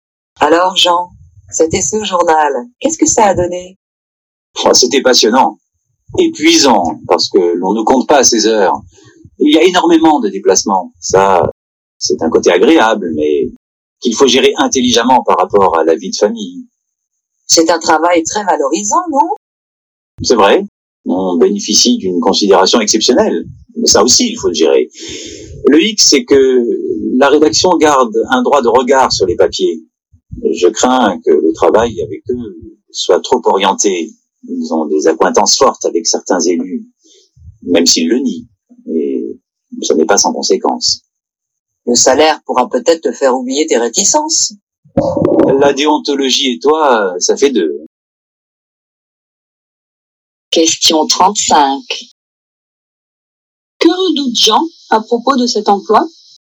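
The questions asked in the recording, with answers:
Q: Que redoute Jean à propos de cet emploi ?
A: Que le travail soit trop orienté politiquement (manque d'indépendance vis-à-vis de la rédaction et des élus)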